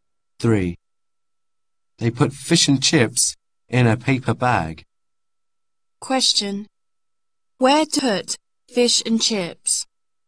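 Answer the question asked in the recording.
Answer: in a paper bag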